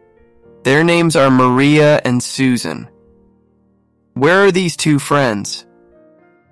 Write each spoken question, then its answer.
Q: Where are these two friends?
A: In a small city between green hills.